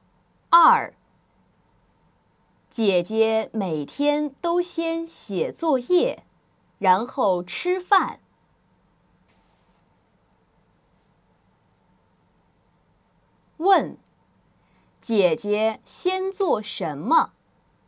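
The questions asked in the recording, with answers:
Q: 问,姐姐先做什么?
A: 写作业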